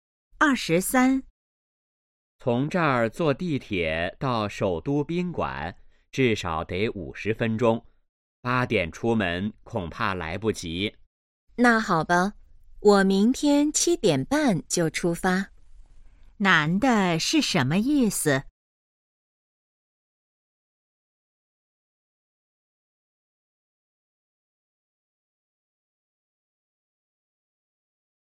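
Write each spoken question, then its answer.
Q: 男的是什么意思?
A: 明天7点半出发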